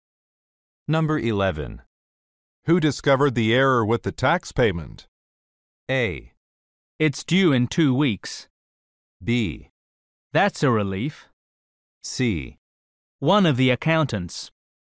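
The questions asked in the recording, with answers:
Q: Who discovered the error with the tax payment?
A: C: One of the accountants.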